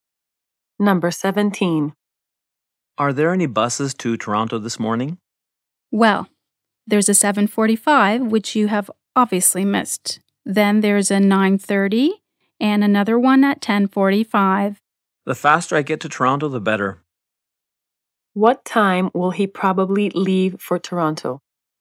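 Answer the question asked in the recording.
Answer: 9:30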